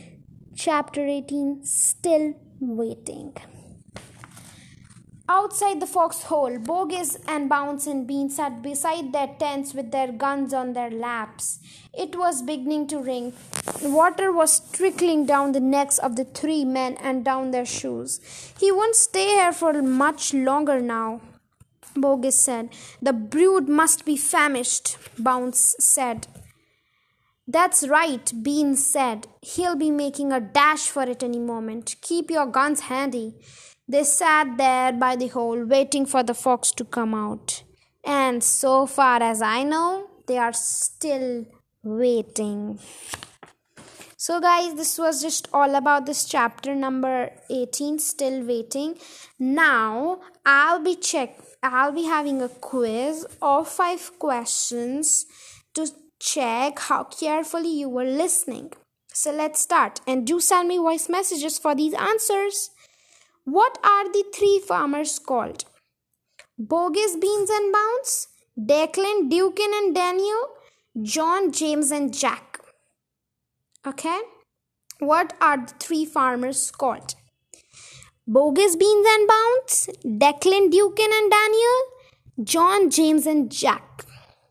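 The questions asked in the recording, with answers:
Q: What are the three farmers called?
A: Bogus, Beans and Bounce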